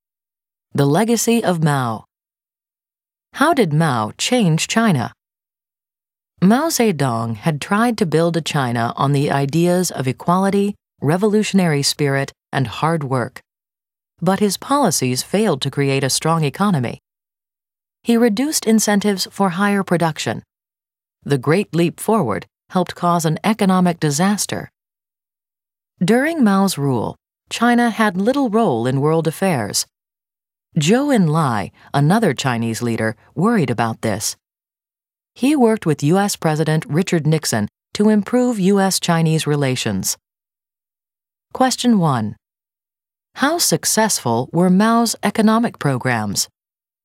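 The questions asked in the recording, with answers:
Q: How successful were Mao's economic programs?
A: Not successful; they failed to create a strong economy and helped cause economic disaster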